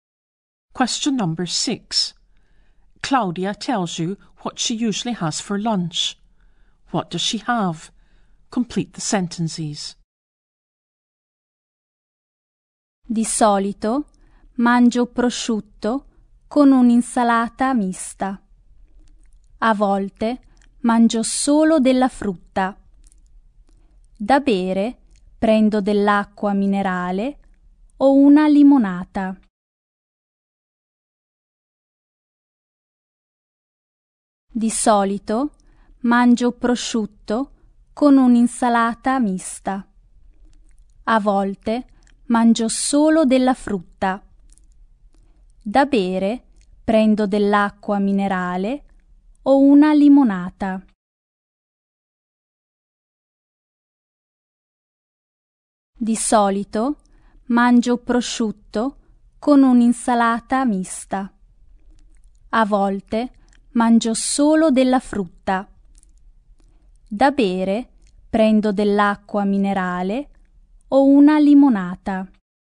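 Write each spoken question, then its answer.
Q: What does she have?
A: Usually ham with mixed salad, sometimes just fruit; to drink mineral water or lemonade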